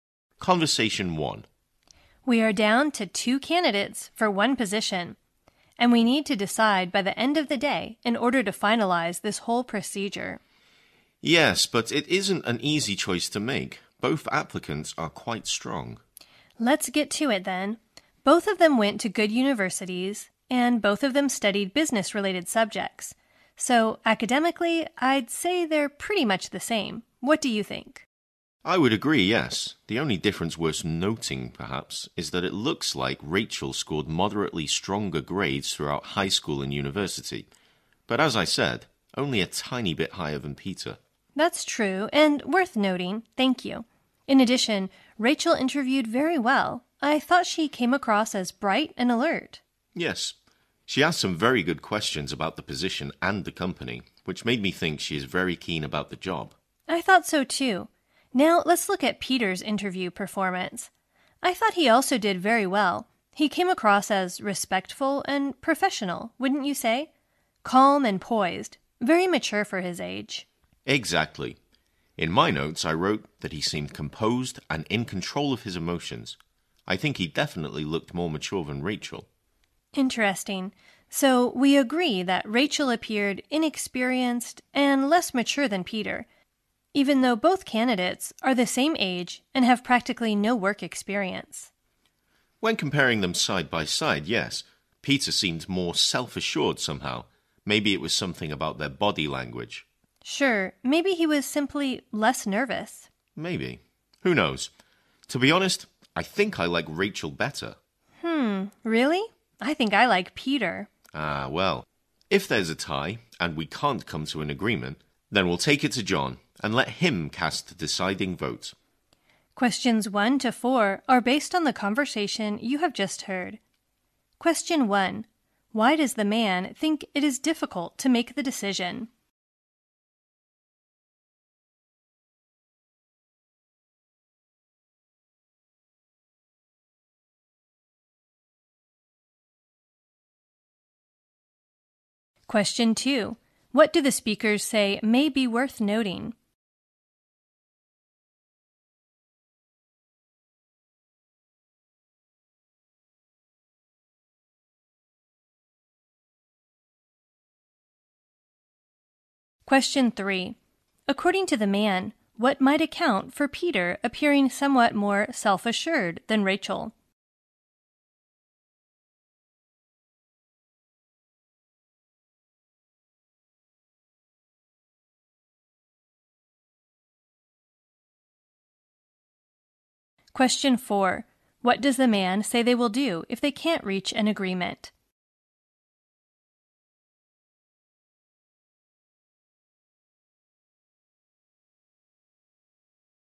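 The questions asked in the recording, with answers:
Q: Why does the man think it is difficult to make the decision?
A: Both applicants are quite strong.

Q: What do the speakers say may be worth noting?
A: Rachel scored moderately stronger grades throughout high school and university.

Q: What does the man say they will do if they can't reach an agreement?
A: Take it to John and let him cast the deciding vote.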